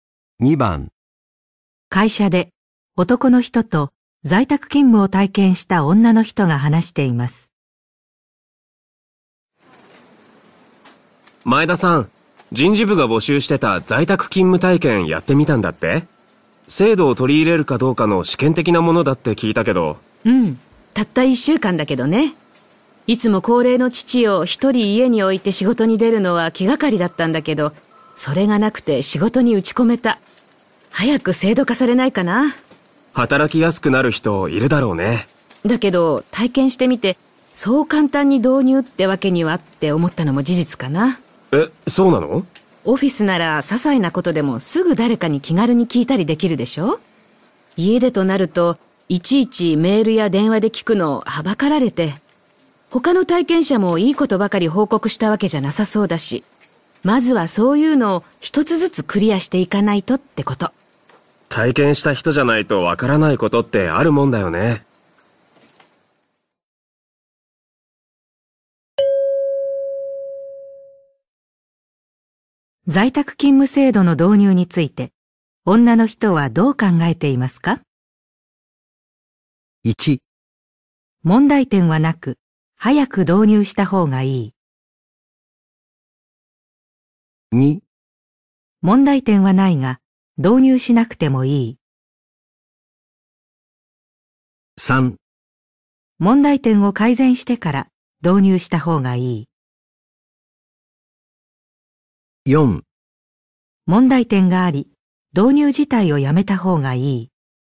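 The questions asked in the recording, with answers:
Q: 在宅勤務制度の導入について、女の人はどう考えていますか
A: 3: 問題点を改善してから導入した方がいい。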